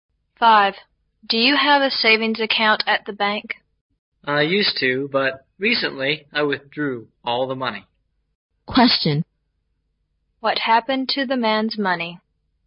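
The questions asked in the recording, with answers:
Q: What happened to the man's money?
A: He withdrew all of it from the bank.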